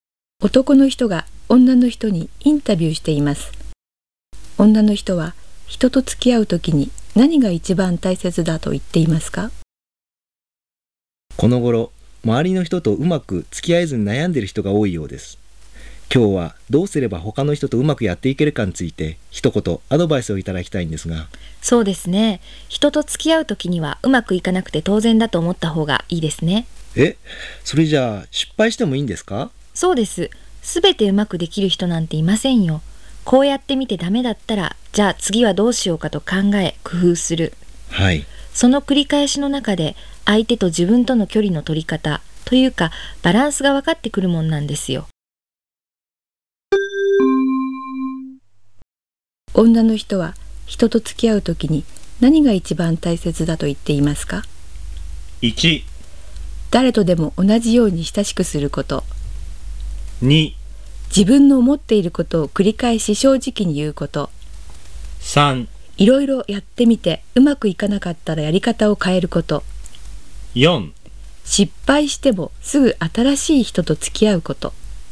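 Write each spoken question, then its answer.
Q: 女の人は人と付き合うときに何が一番大切だと言っていますか?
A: 3: いろいろやってみてうまくいかなかったらやり方を変えること。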